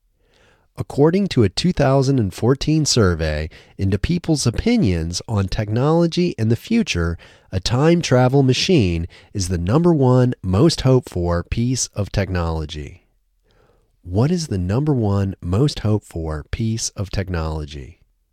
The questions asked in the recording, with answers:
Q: What is the number one most hoped for piece of technology?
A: The number one most hoped for piece of technology is a time travel machine.